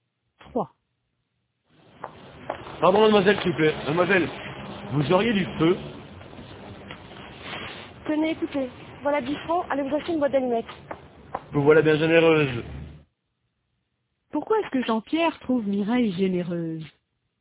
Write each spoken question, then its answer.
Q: Pourquoi est-ce que Jean-Pierre trouve Mireille généreuse?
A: Parce qu'elle lui a donné 10 francs.